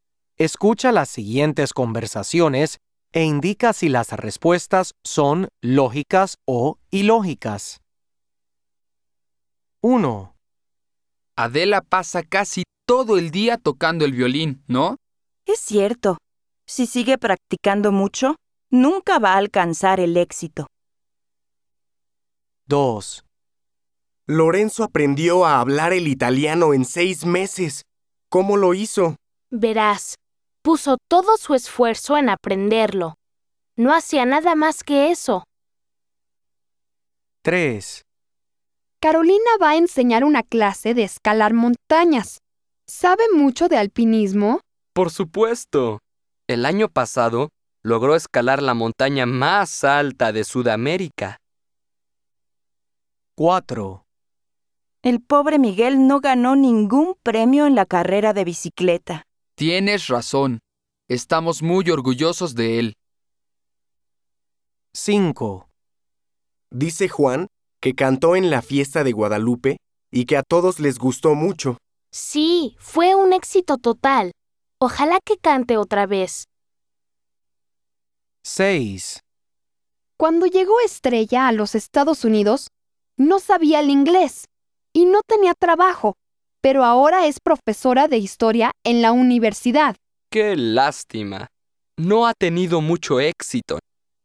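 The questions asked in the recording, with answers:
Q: Adela pasa casi todo el día tocando el violín, ¿no?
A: ilógica

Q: Lorenzo aprendió a hablar el italiano en 6 meses.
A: lógica

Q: Carolina va a enseñar una clase de escalar montañas.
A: lógica

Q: El pobre Miguel no ganó ningún premio en la carrera de bicicleta.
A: ilógica

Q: Dice Juan que cantó en la fiesta de Guadalupe y que a todos les gustó mucho.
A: lógica

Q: Cuando llegó Estrella a los Estados Unidos, no sabía el inglés y no tenía trabajo, pero ahora es profesora de historia en la universidad.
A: ilógica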